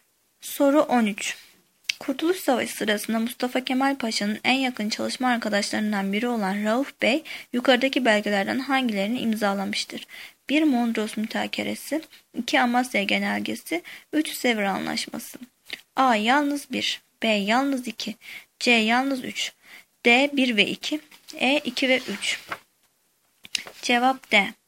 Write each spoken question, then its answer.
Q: Kurtuluş Savaşı sırasında Mustafa Kemal Paşa'nın en yakın çalışma arkadaşlarından biri olan Rauf Bey, yukarıdaki belgelerden hangilerini imzalamıştır?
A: Cevap D.